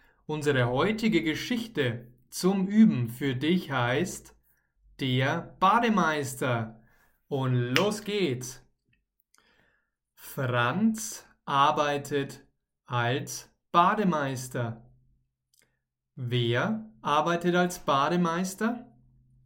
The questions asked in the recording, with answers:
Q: Wer arbeitet als Bademeister?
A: Franz. Franz arbeitet als Bademeister.